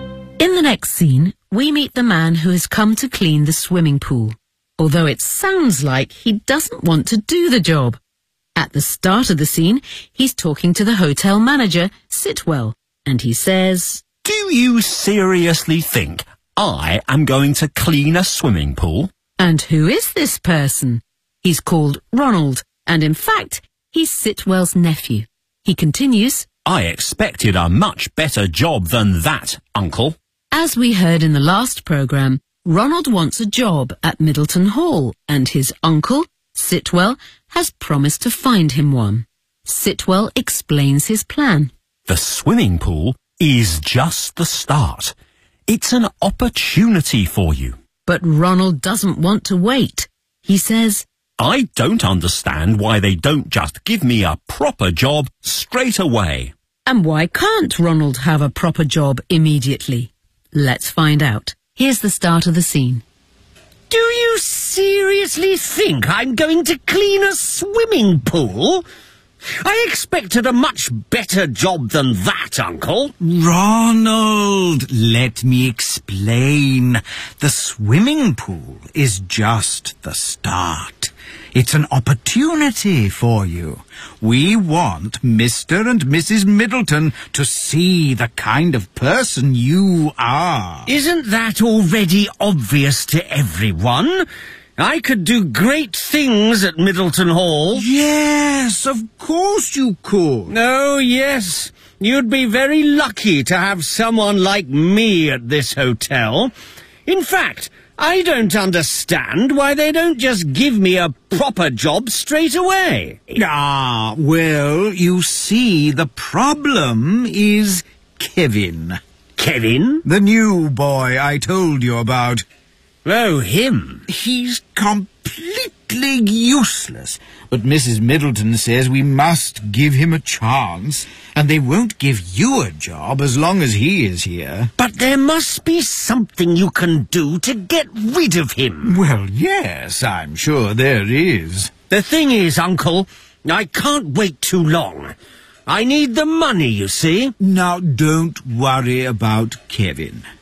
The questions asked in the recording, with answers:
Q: And why can't Ronald have a proper job immediately?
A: The problem is Kevin.